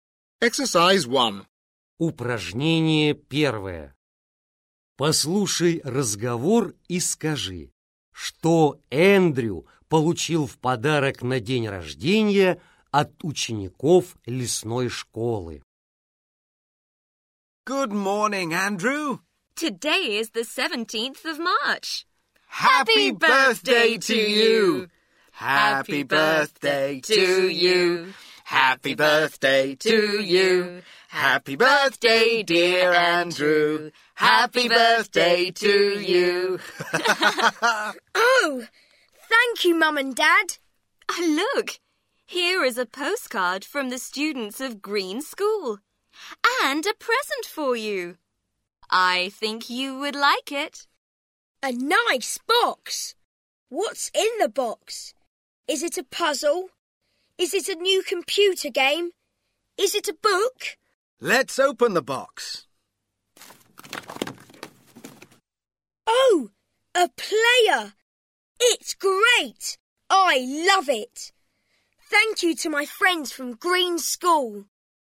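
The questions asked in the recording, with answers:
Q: Послушай разговор и скажи, что Эндрю получил в подарок на день рождения от учеников лесной школы.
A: плеер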